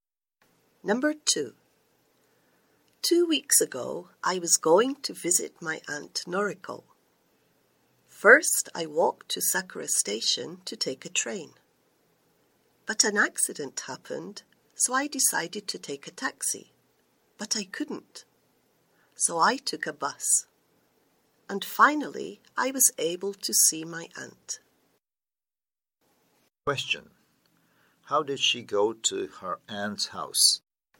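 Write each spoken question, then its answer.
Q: How did she go to her aunt's house?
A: She walked to the station and then took a bus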